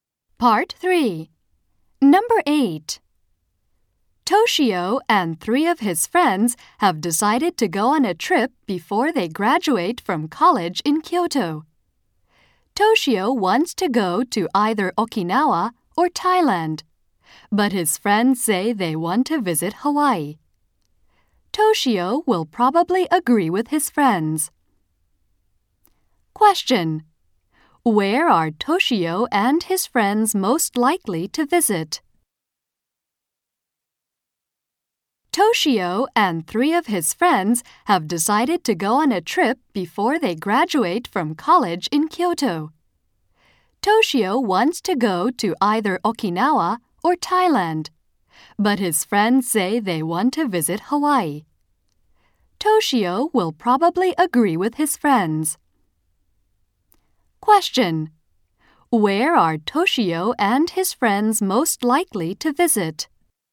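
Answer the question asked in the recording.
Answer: Hawaii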